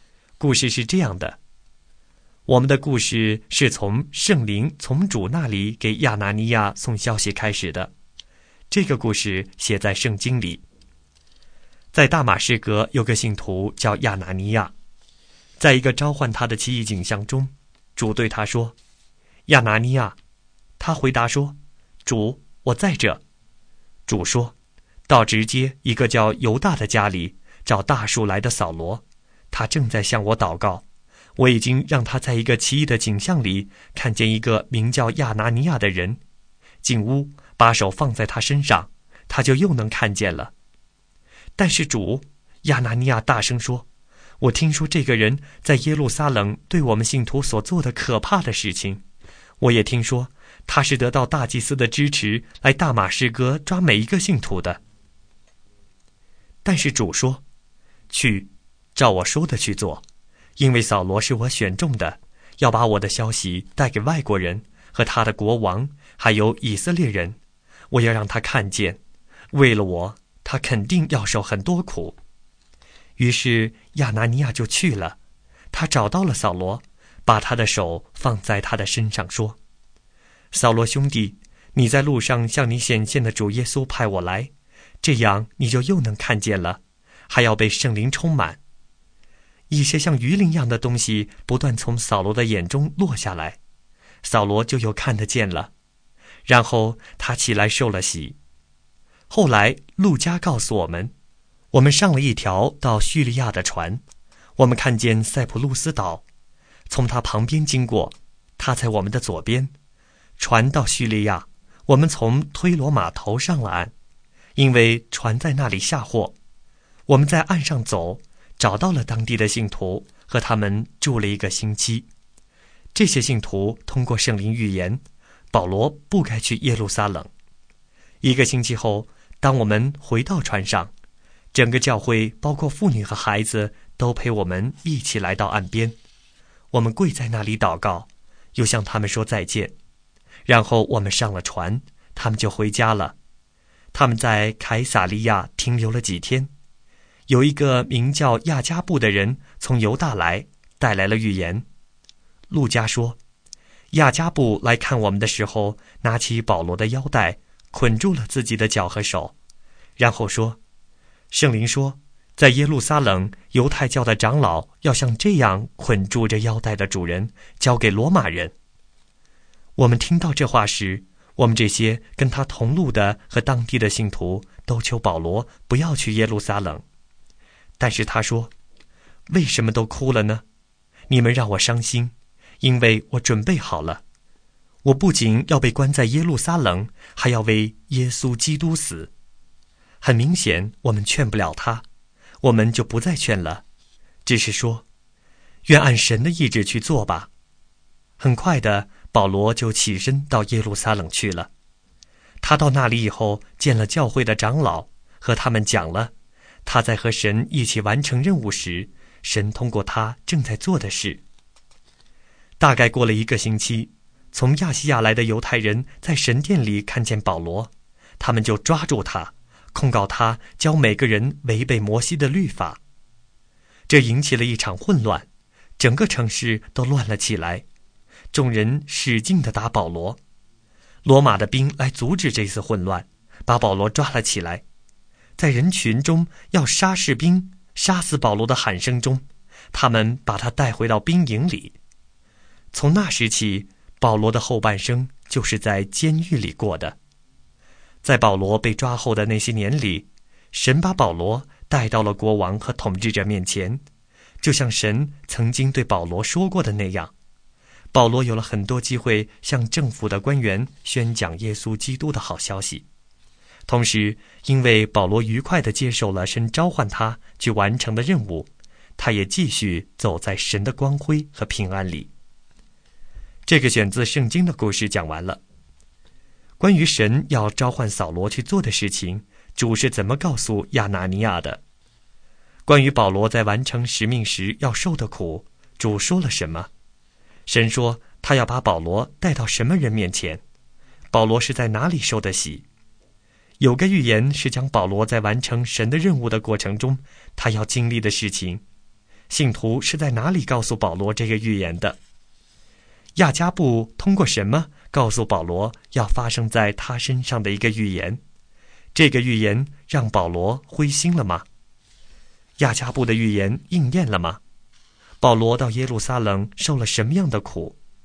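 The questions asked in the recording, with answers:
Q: 关于神要召唤扫罗去做的事情,主是怎么告诉亚拿尼亚的?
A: 扫罗是主选中的,要把主的消息带给外国人和他们的国王,还有以色列人

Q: 关于保罗在完成使命时要受的苦,主说了什么?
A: 为了主,他肯定要受很多苦

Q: 保罗是在哪里受的洗?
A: 在大马士革(叫犹大的人家里)

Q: 信徒是在哪里告诉保罗这个预言的?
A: 在推罗

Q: 亚加布通过什么告诉保罗要发生在他身上的一个预言?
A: 用保罗的腰带捆住自己的手和脚

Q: 这个预言让保罗灰心了吗?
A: 没有,他准备好为耶稣被关,甚至死

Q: 亚加布的预言应验了吗?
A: 应验了,保罗在耶路撒冷被抓

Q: 保罗到耶路撒冷受了什么样的苦?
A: 被众人狠狠地打,被罗马兵抓走,后半生在监狱里度过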